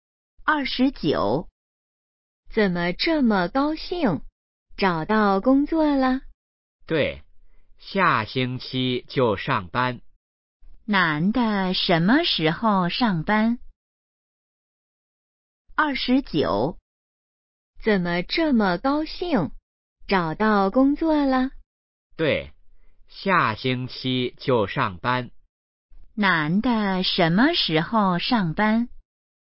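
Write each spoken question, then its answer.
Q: 男的什么时候上班?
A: 下星期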